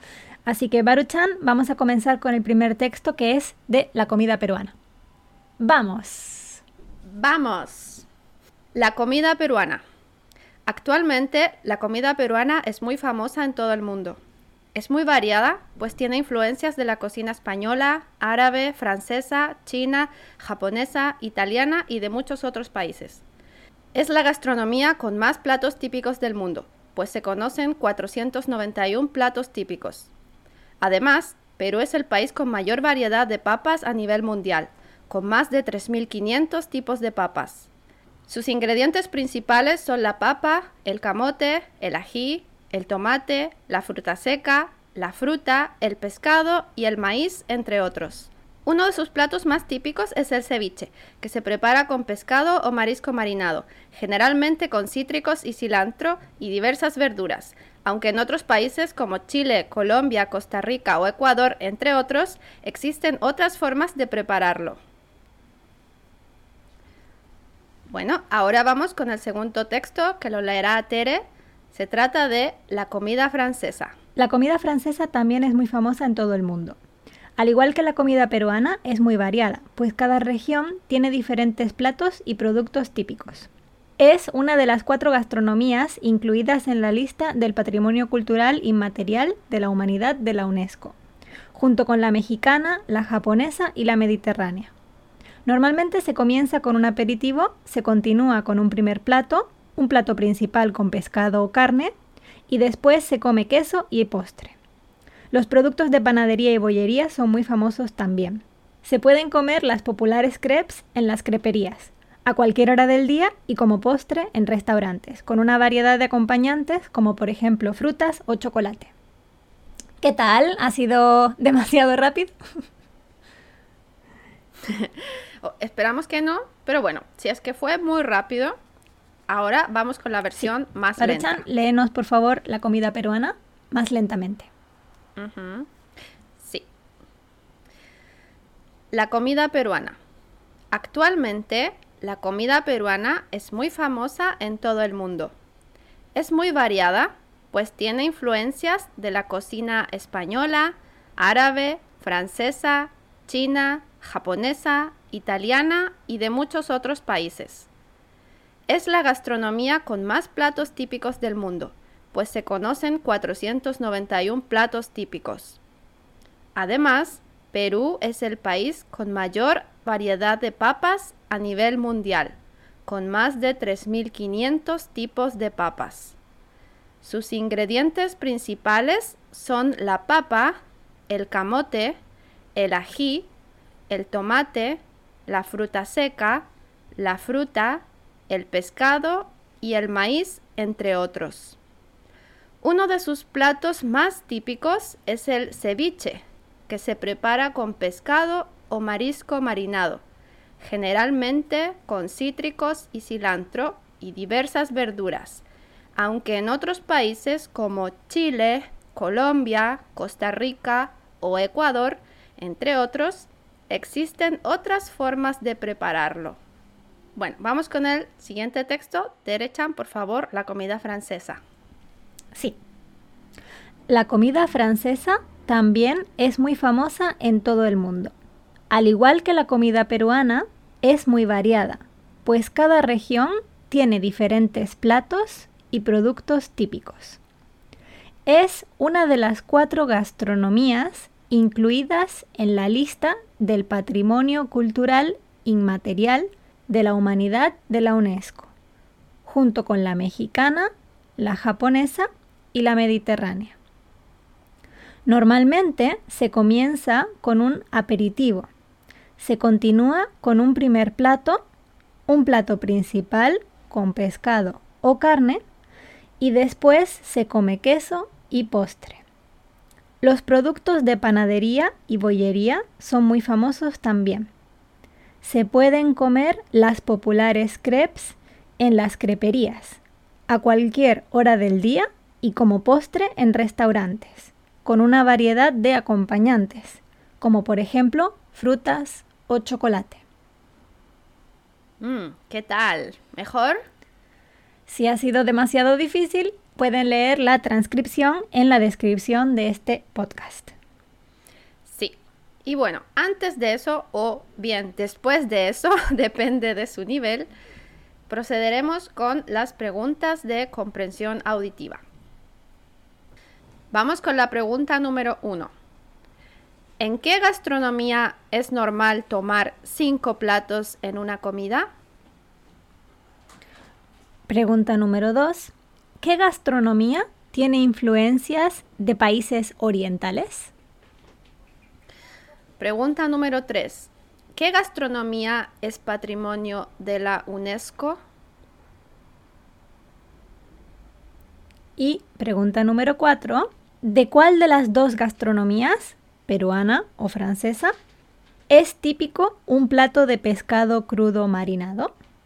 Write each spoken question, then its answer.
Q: ¿En qué gastronomía es normal tomar cinco platos en una comida?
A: la comida francesa.

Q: ¿Qué gastronomía tiene influencias de países orientales?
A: la comida peruana.

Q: ¿Qué gastronomía es patrimonio de la UNESCO?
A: La respuesta es la comida francesa.

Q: ¿De cuál de las dos gastronomías, peruana o francesa, es típico un plato de pescado crudo marinado?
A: La respuesta es de la gastronomía peruana.